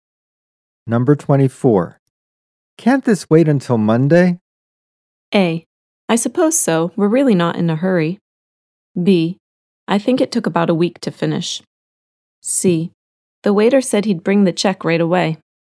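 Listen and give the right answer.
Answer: A: I suppose so. We're really not in a hurry.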